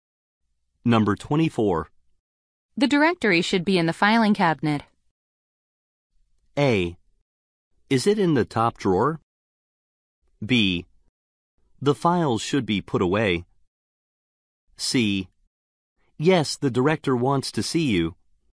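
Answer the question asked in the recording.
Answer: A: Is it in the top drawer?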